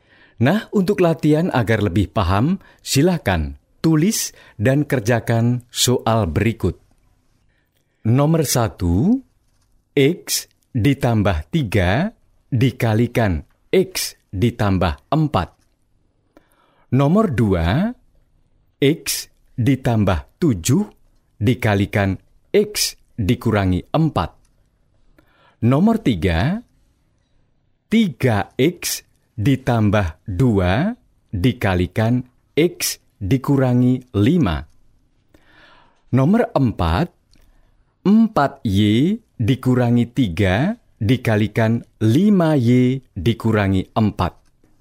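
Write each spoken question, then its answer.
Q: Nomor 1, X ditambah 3 dikalikan X ditambah 4.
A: x2 + 7x + 12

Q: Nomor 2, X ditambah 7 dikalikan X dikurangi 4.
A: x2 + 3x − 28

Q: Nomor 3, 3X ditambah 2 dikalikan X dikurangi 5.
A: 3x2 − 13x − 10

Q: Nomor 4, 4Y dikurangi 3 dikalikan 5Y dikurangi 4.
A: 20y2 − 31y + 12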